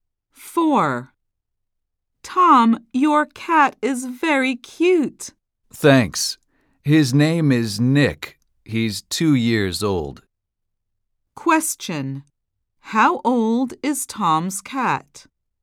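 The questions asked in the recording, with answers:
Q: How old is Tom's cat?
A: 2 years old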